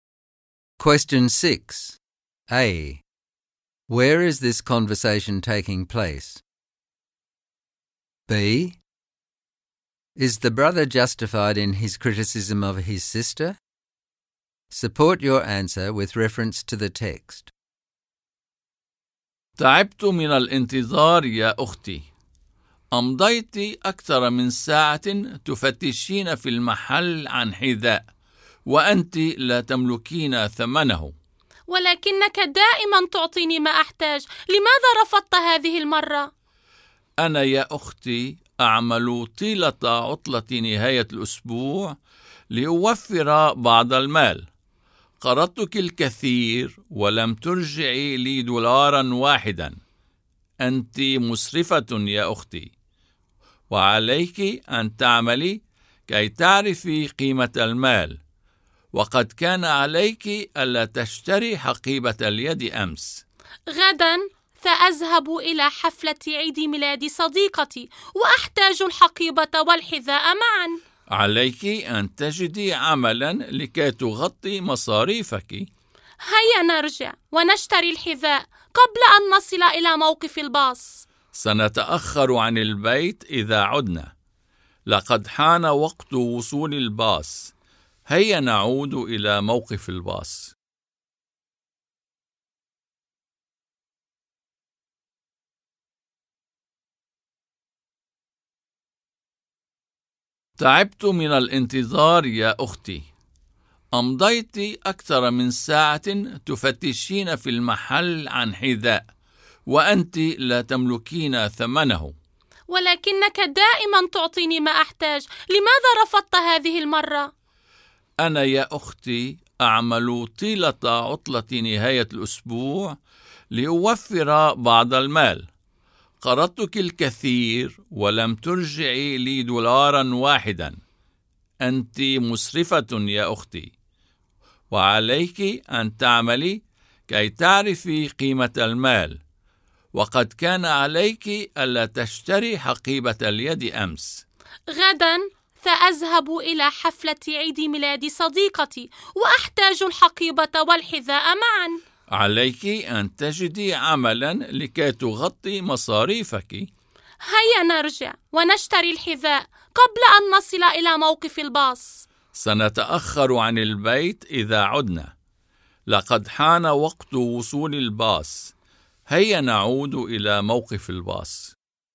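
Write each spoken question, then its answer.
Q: B. Is the brother justified in his criticism of his sister?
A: Yes. She spends too much money: she bought a handbag yesterday, now wants shoes she can't pay for, and has never paid back what he lent her, while he works every weekend.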